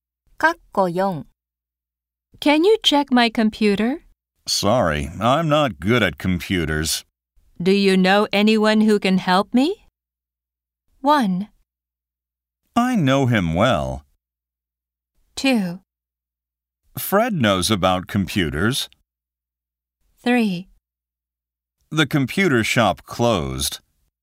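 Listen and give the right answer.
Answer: 2: Fred knows about computers.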